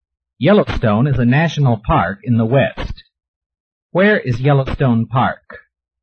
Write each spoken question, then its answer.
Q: Where is Yellowstone Park?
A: Yellowstone Park is in the West.